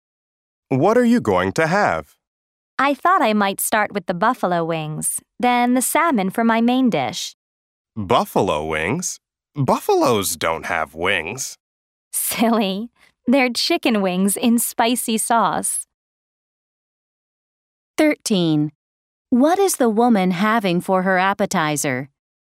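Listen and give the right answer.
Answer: Buffalo wings (chicken wings in spicy sauce)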